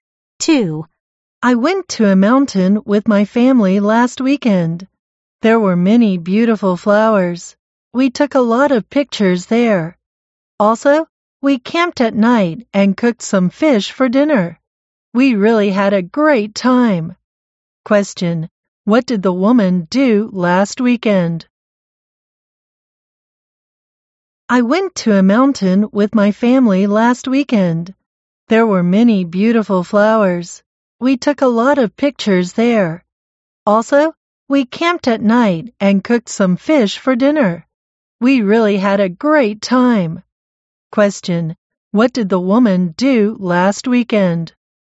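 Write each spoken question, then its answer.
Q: Question, what did the woman do last weekend?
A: She went to a mountain with her family, took pictures and camped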